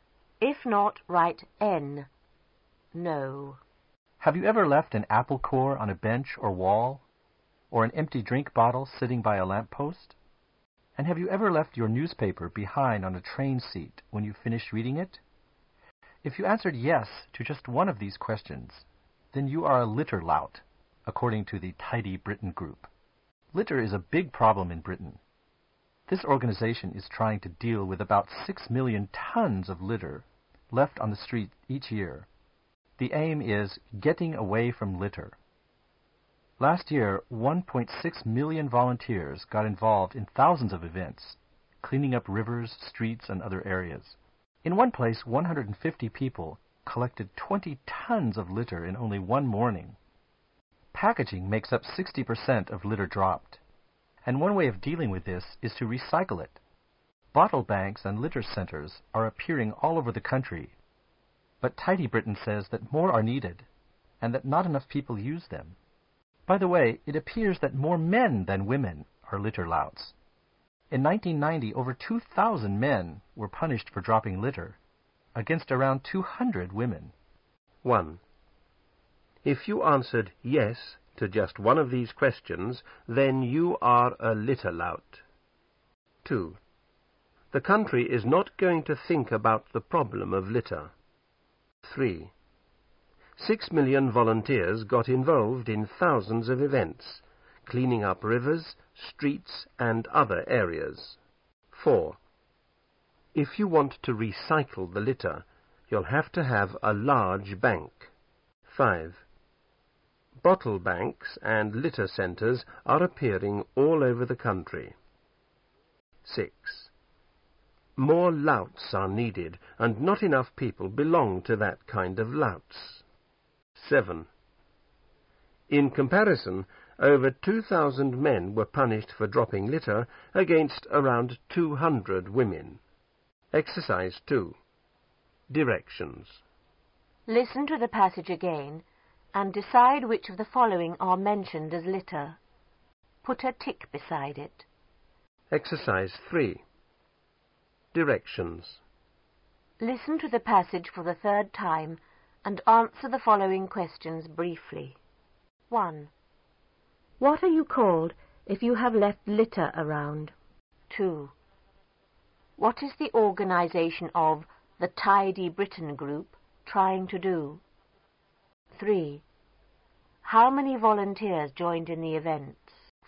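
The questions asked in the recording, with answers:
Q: What are you called if you have left litter around?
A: A litter lout

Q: What is the organization of the Tidy Britain Group trying to do?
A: Deal with about 6 million tons of litter left on the street each year

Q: How many volunteers joined in the events?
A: 1.6 million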